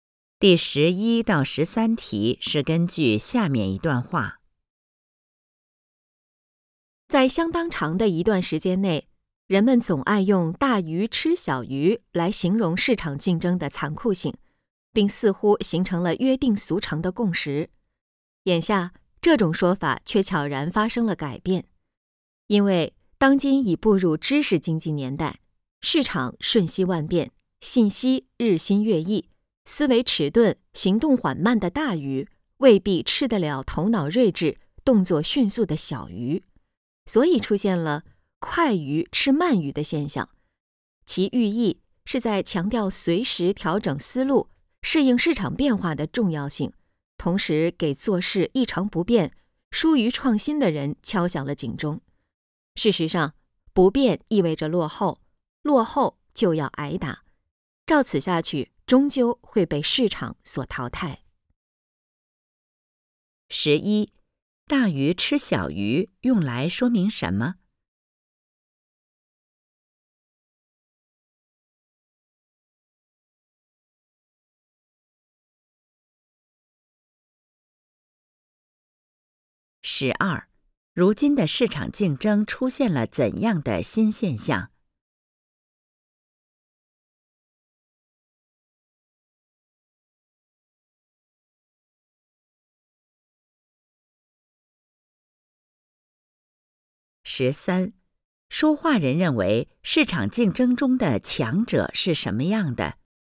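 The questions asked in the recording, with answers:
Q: 大鱼吃小鱼用来说明什么?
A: 市场竞争很残酷

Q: 如今的市场竞争出现了怎样的新现象?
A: 快鱼吃慢鱼

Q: 说话人认为市场竞争中的强者是什么样的?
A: 头脑睿智、动作迅速,能随时调整思路适应市场变化的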